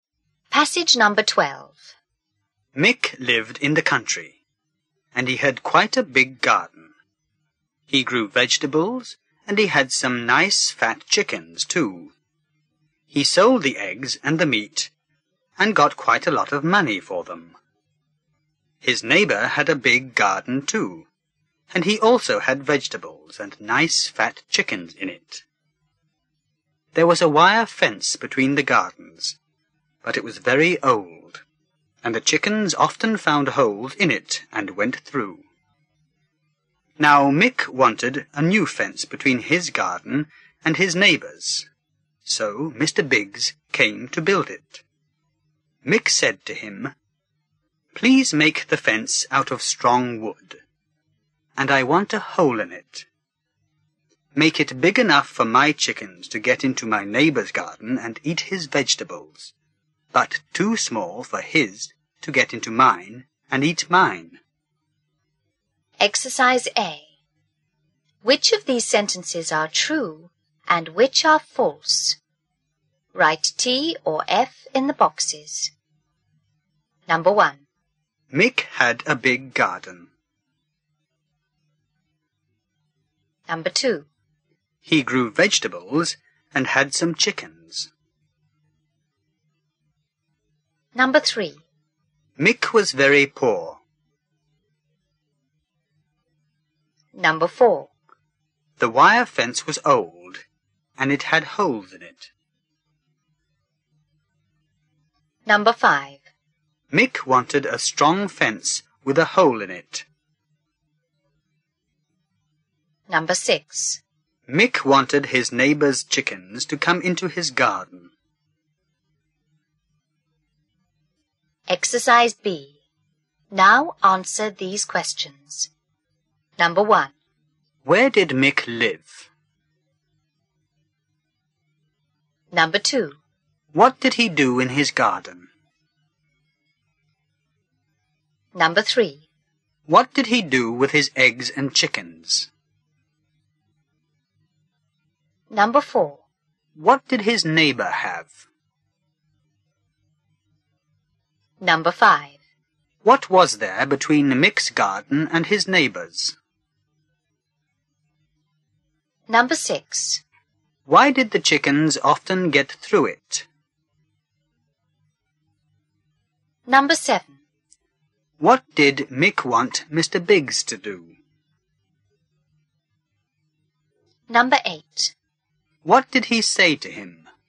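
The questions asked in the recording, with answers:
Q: Mick had a big garden.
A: True

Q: He grew vegetables and had some chickens.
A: True

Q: Mick was very poor.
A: False

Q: The wire fence was old and it had holes in it.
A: True

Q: Mick wanted a strong fence with a hole in it.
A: True

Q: Mick wanted his neighbour's chickens to come into his garden.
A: False

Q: Where did Mick live?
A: In the country

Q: What did he do in his garden?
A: He grew vegetables and kept chickens

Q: What did he do with his eggs and chickens?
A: He sold them

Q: What did his neighbour have?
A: A big garden with vegetables and chickens

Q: What was there between Mick's garden and his neighbour's?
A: An old wire fence

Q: Why did the chickens often get through it?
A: It was old and had holes

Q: What did Mick want Mr. Biggs to do?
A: Build a new fence

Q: What did he say to him?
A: Make the fence of strong wood with a hole big enough for his chickens but too small for his neighbour's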